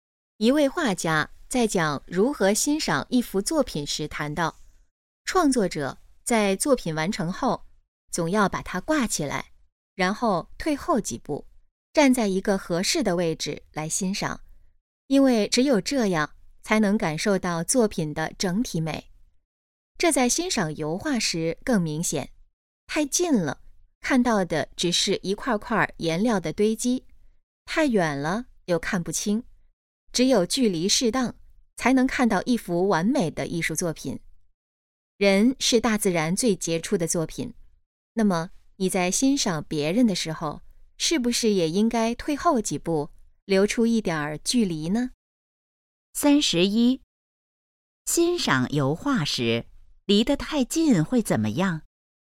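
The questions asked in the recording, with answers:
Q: 欣赏油画时离得太近会怎么样?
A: 只看到一块块颜料的堆积

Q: 这段话主要想告诉我们什么?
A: 欣赏别人时要保持一点距离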